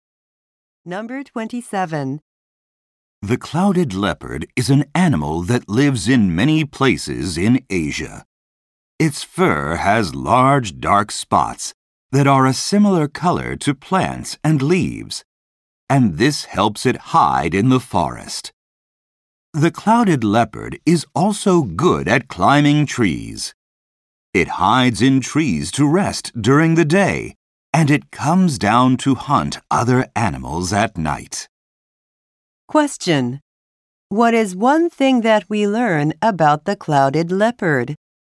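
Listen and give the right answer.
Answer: It hunts at night.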